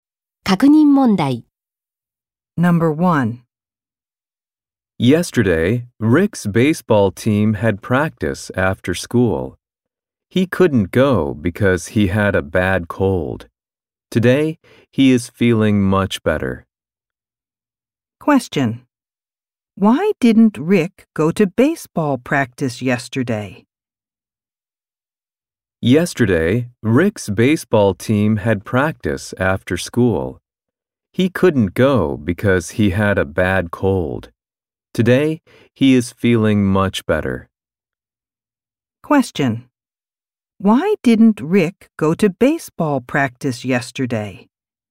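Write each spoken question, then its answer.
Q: Why didn't Rick go to baseball practice yesterday?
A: Because he had a bad cold.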